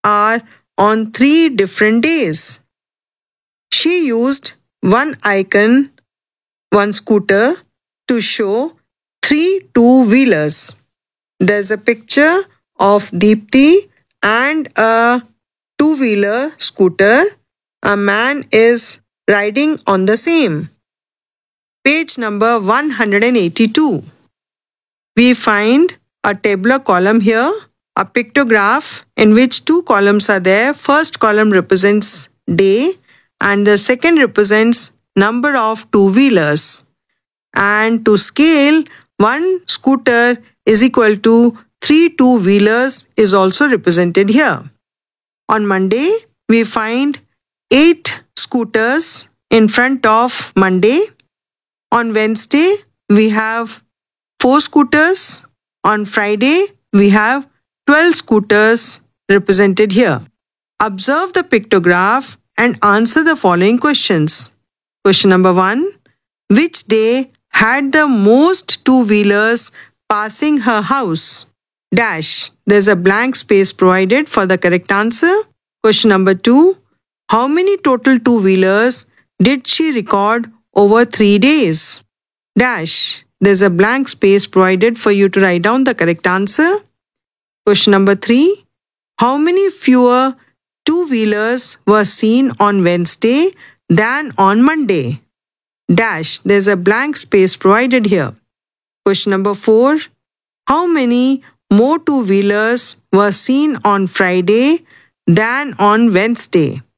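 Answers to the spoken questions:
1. Friday
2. 72
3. 12
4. 24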